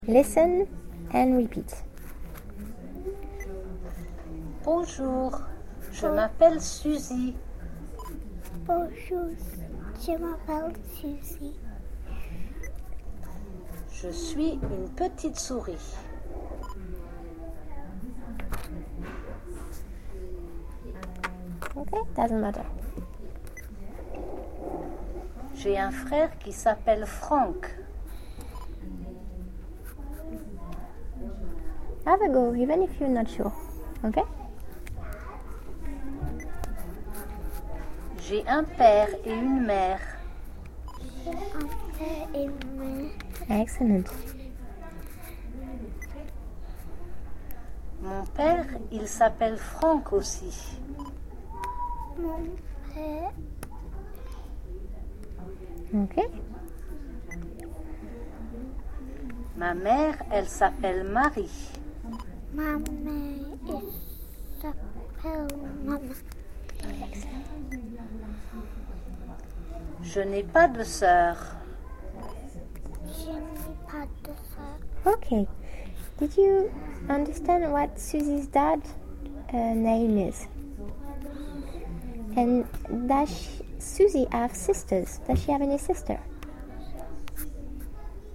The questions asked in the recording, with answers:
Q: Does she have any sister?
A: No, she doesn't.